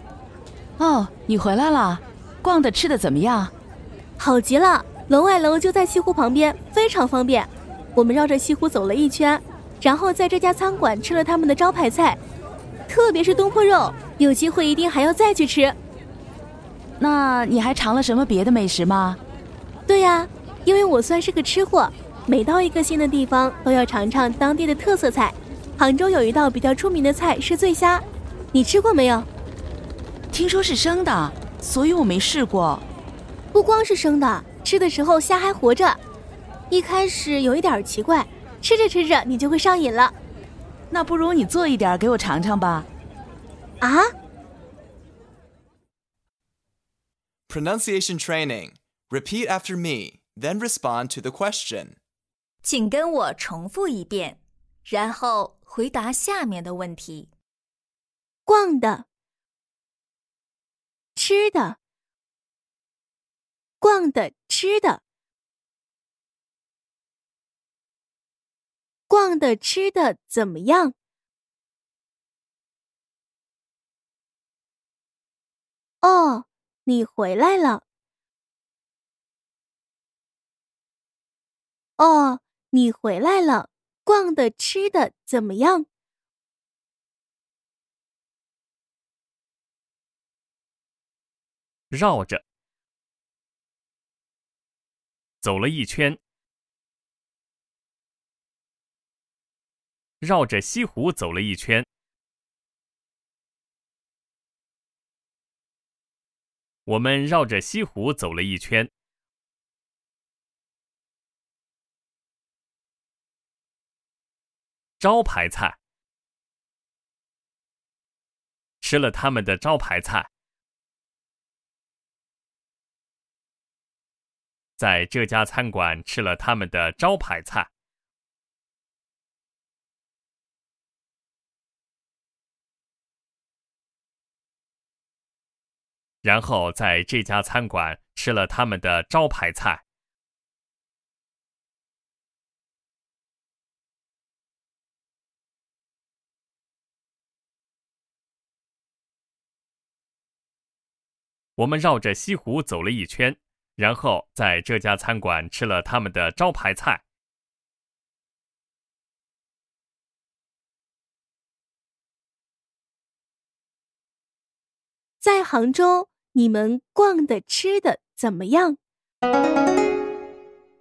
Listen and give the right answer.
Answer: 我们绕着西湖走了一圈,然后在这家餐馆吃了他们的招牌菜。